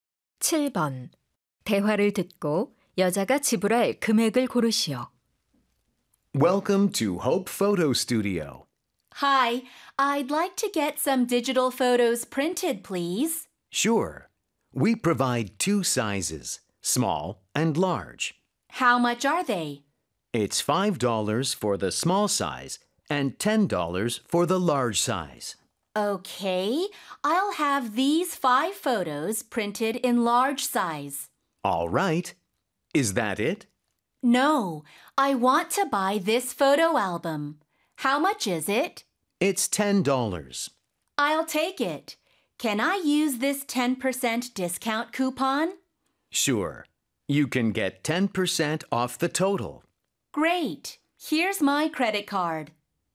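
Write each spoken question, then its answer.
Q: 대화를 듣고 여자가 지불할 금액을 고르시오.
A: 54달러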